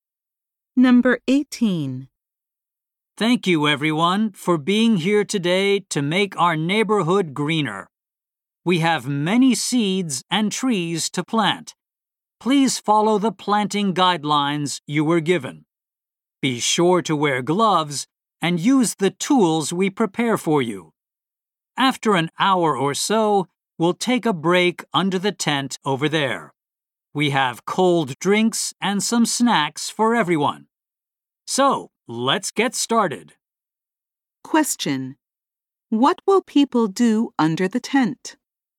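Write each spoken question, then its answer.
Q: What will people do under the tent?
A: Take a break and have cold drinks and snacks.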